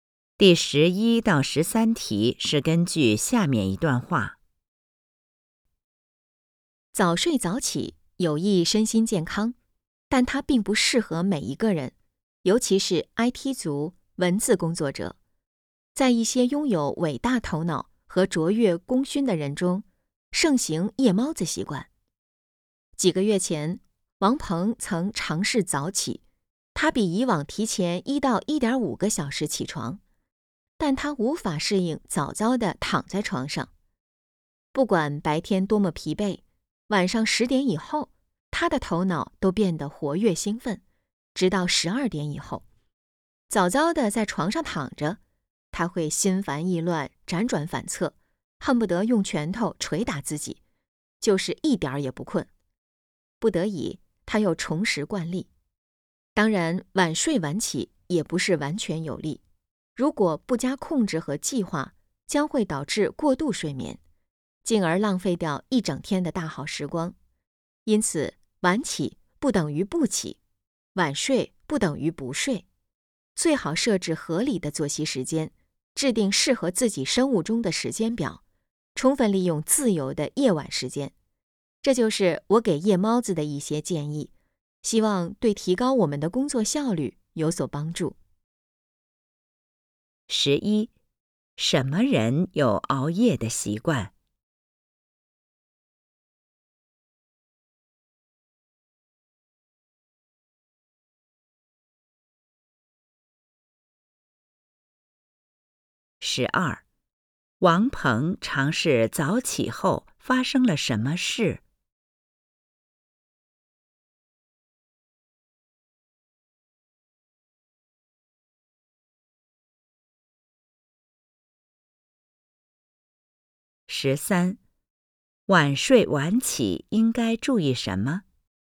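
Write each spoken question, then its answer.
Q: 王鹏尝试早起后发生了什么事?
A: 他无法适应早睡,躺在床上心烦意乱、辗转反侧,最后又恢复了原来的习惯

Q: 晚睡晚起应该注意什么?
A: 要加以控制和计划,避免过度睡眠,设置合理的作息时间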